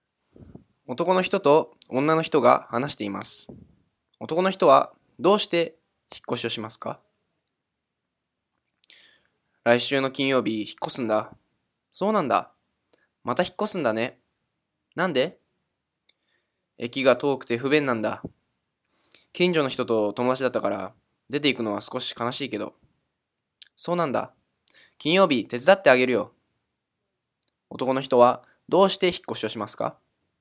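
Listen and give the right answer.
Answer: 駅が遠くて不便だから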